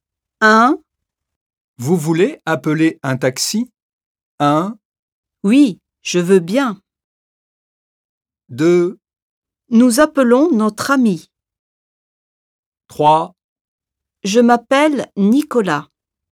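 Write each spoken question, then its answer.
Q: Vous voulez appeler un taxi ?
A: 1: Oui, je veux bien.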